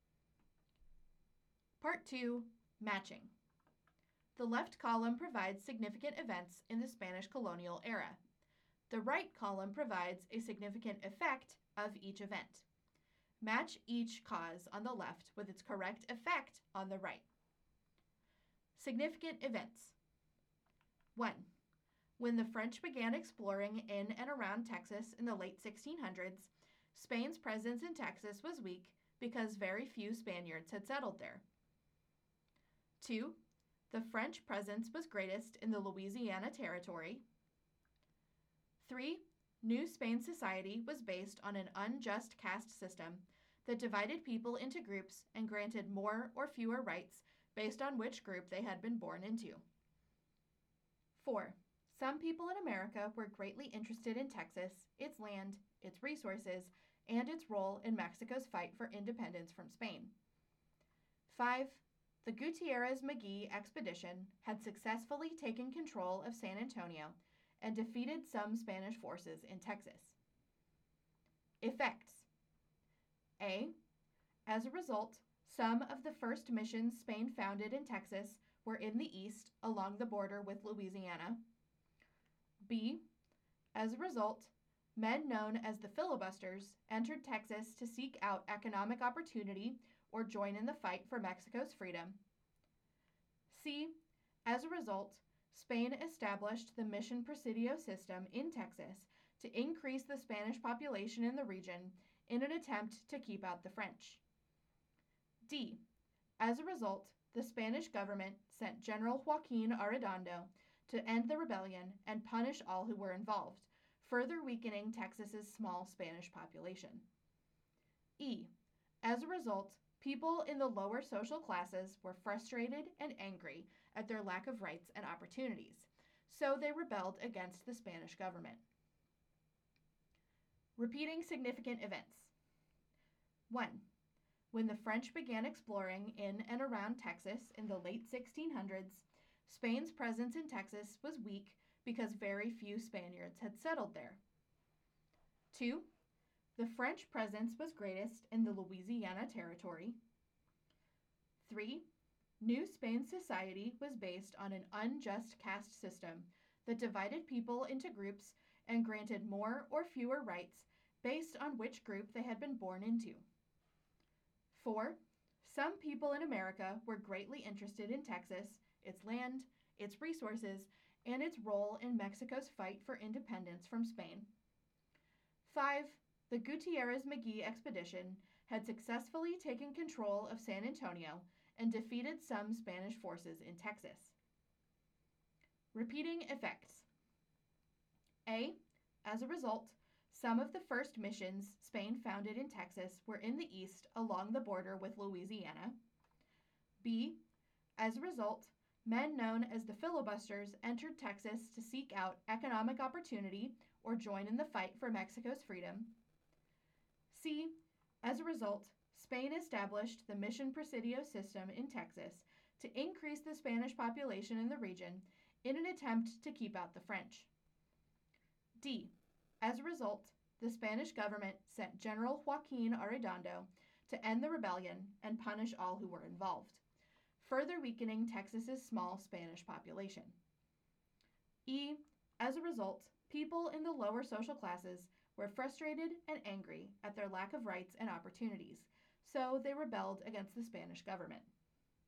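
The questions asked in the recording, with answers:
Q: When the French began exploring in and around Texas in the late 1600s, Spain's presence in Texas was weak because very few Spaniards had settled there.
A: C: As a result, Spain established the Mission Presidio system in Texas to increase the Spanish population in the region in an attempt to keep out the French.

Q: The French presence was greatest in the Louisiana Territory.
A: A: As a result, some of the first missions Spain founded in Texas were in the east along the border with Louisiana.

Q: New Spain society was based on an unjust caste system that divided people into groups and granted more or fewer rights based on which group they had been born into.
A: E: As a result, people in the lower social classes were frustrated and angry at their lack of rights and opportunities, so they rebelled against the Spanish government.

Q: Some people in America were greatly interested in Texas, its land, its resources, and its role in Mexico's fight for independence from Spain.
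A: B: As a result, men known as the filibusters entered Texas to seek out economic opportunity or join in the fight for Mexico's freedom.

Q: The Gutierrez-McGee expedition had successfully taken control of San Antonio and defeated some Spanish forces in Texas.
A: D: As a result, the Spanish government sent General Joaquin Arredondo to end the rebellion and punish all who were involved, further weakening Texas's small Spanish population.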